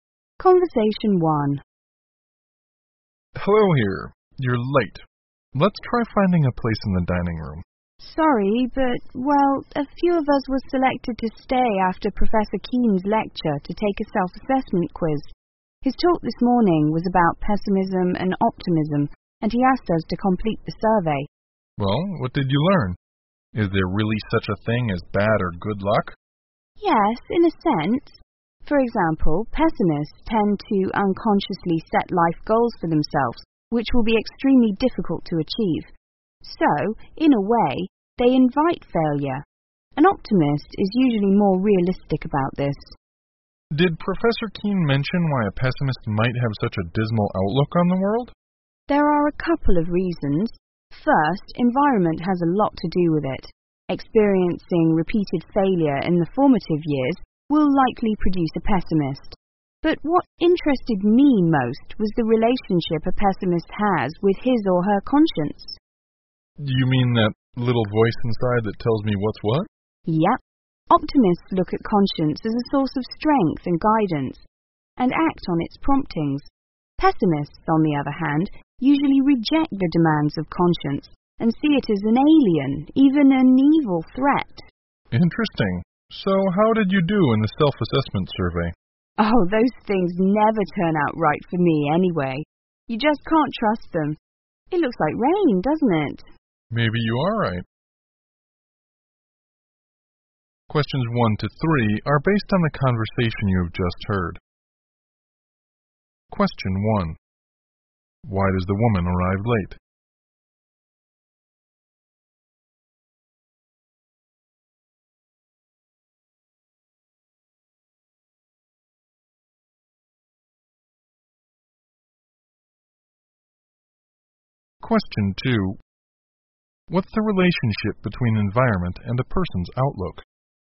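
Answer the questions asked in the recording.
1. She was selected to stay after Professor Keane's lecture to take a self-assessment quiz.
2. Experiencing repeated failure in the formative years will likely produce a pessimist.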